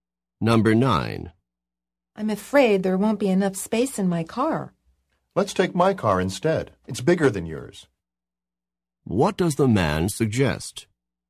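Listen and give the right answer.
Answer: Taking his car, because it is bigger.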